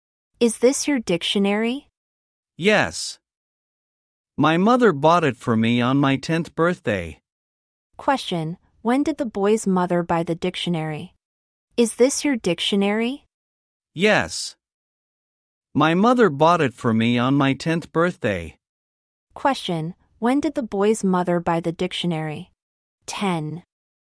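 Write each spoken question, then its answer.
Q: when did the boy's mother buy the dictionary?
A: On his 10th birthday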